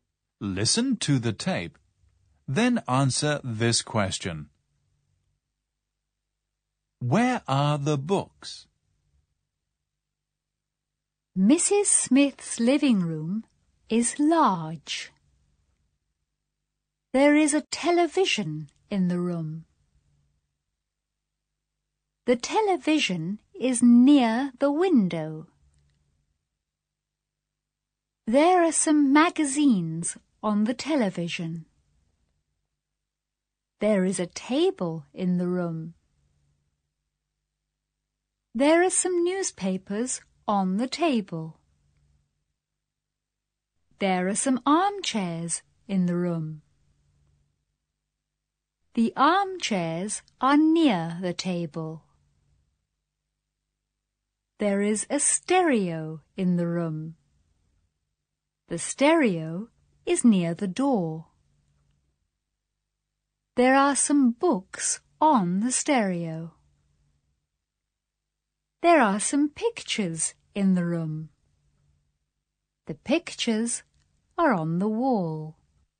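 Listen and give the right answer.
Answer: On the stereo.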